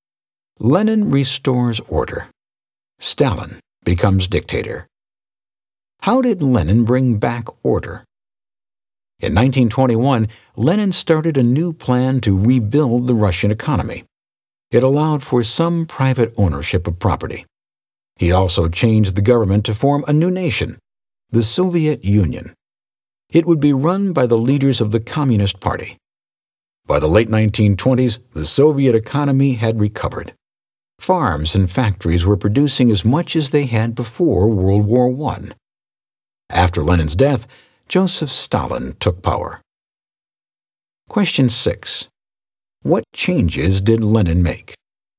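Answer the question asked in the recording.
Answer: A new economic plan allowing some private property, and a new nation, the Soviet Union, run by the Communist Party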